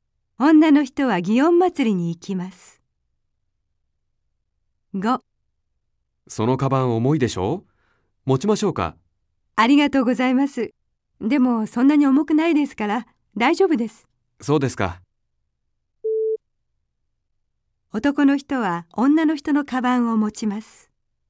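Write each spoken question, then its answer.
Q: 男の人は女の人のカバンを持ちます。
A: いいえ(×)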